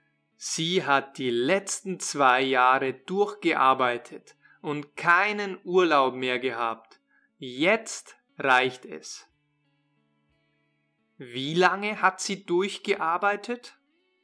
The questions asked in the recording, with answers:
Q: Wie lange hat sie durchgearbeitet?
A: die letzten zwei Jahre?